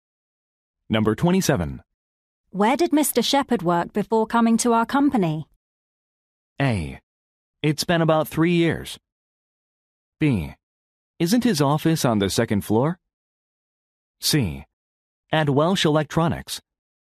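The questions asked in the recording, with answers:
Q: Where did Mr. Shepherd work before coming to our company?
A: C: At Welsh Electronics.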